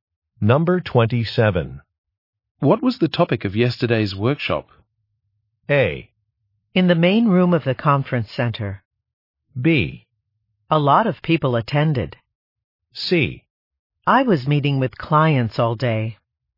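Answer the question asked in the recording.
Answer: C: I was meeting with clients all day.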